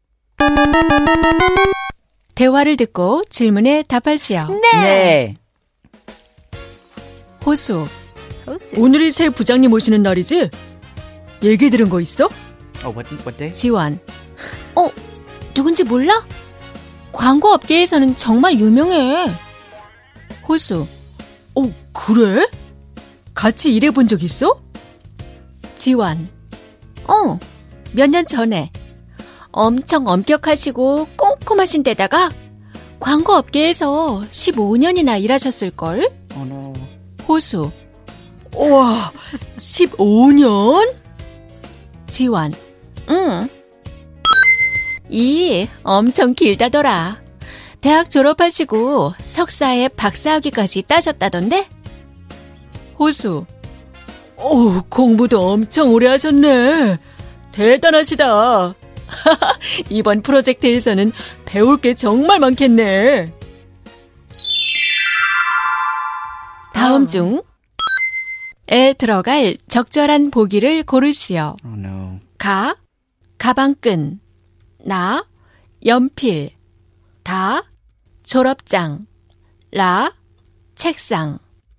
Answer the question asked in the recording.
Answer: So the answer remains 가.